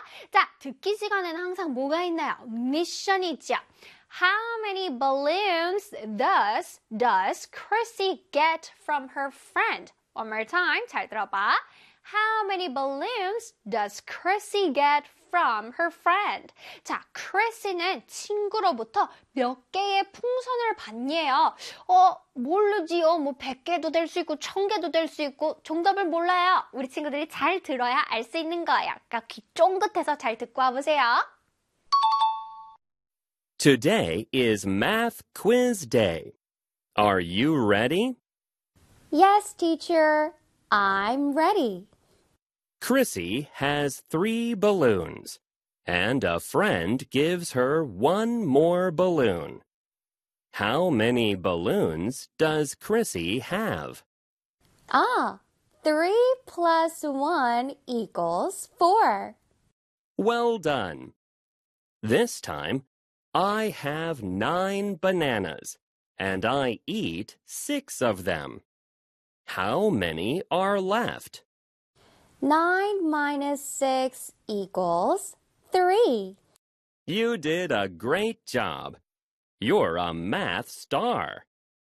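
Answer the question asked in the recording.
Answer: One balloon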